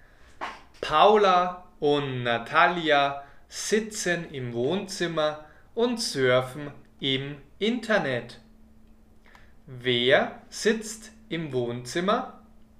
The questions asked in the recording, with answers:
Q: Wer sitzt im Wohnzimmer?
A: Paula und Natalia. Sie sitzen im Wohnzimmer.